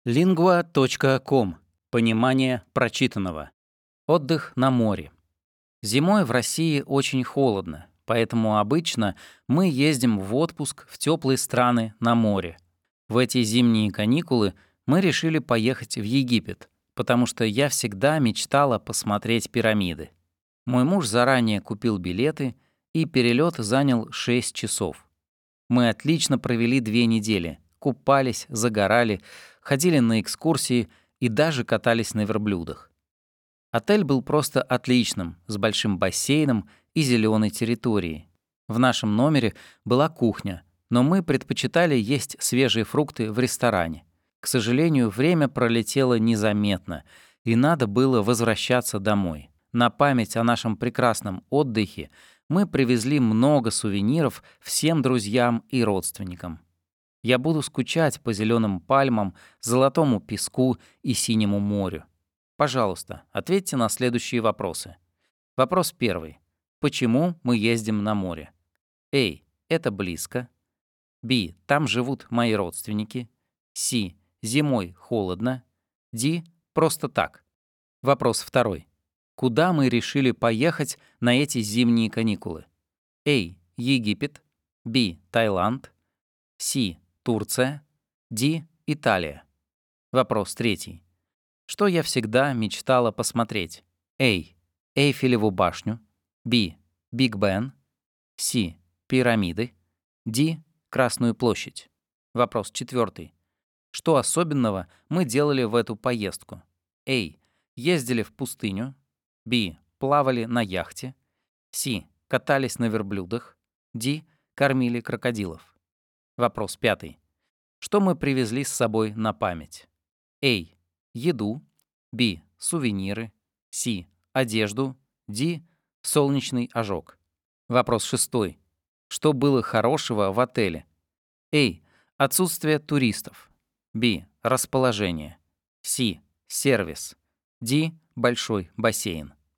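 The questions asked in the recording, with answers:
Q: Почему мы ездим на море?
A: С: Зимой холодно.

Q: Куда мы решили поехать на эти зимние каникулы?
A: А: Египет.

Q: Что я всегда мечтала посмотреть?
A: С: Пирамиды.

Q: Что особенного мы делали в эту поездку?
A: С: Катались на верблюдах.

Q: Что мы привезли с собой на память?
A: Б: Сувениры.

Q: Что было хорошего в отеле?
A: Д: Большой бассейн.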